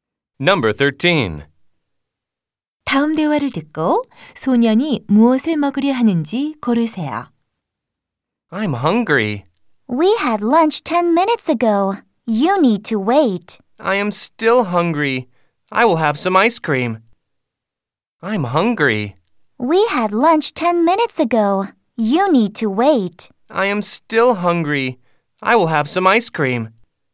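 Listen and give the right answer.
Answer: 아이스크림 (ice cream)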